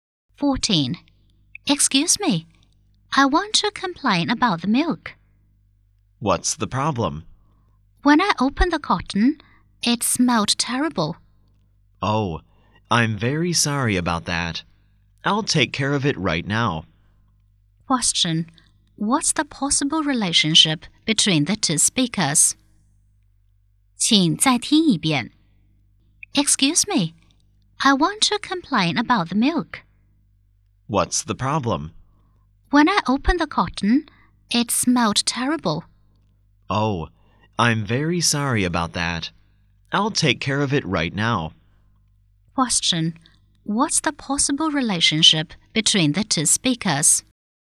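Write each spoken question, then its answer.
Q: What's the possible relationship between the two speakers?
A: Customer and shop assistant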